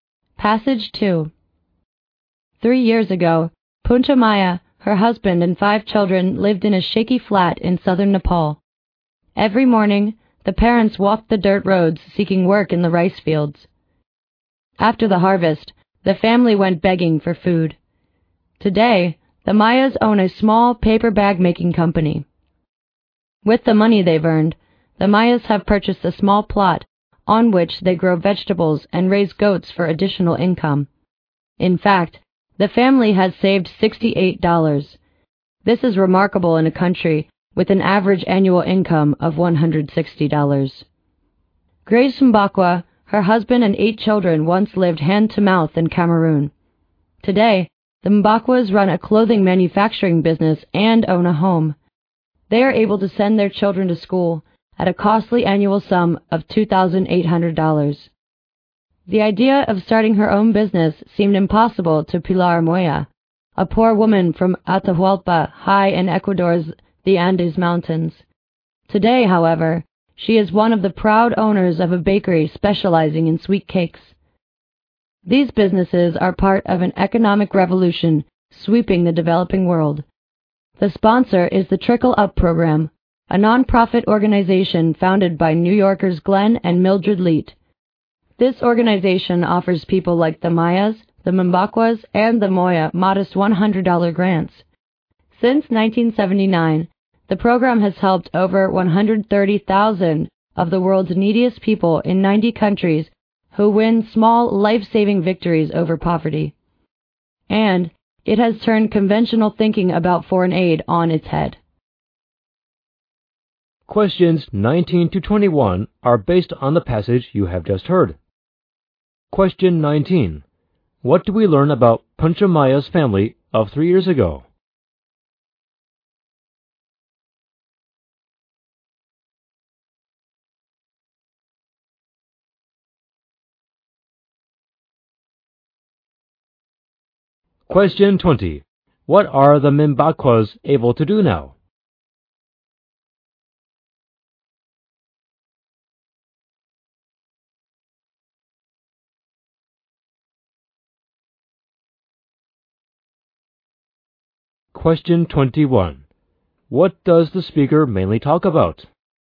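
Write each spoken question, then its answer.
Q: What do we learn about Panchamaya's family of 3 years ago?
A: They were very poor: they looked for work in the rice fields and begged for food after the harvest.

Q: What are the Mimbakwas able to do now?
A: Send their children to school.

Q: What does the speaker mainly talk about?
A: The Trickle Up Program, which helps poor people start small businesses.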